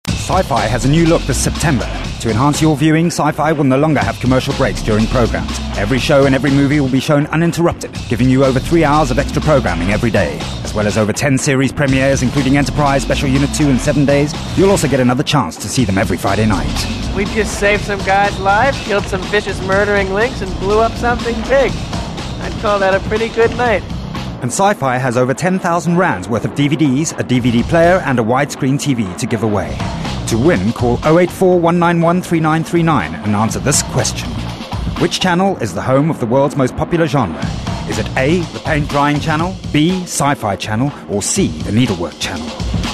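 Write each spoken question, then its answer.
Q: Which channel is the home of the world's most popular genre?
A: B: Sci-Fi channel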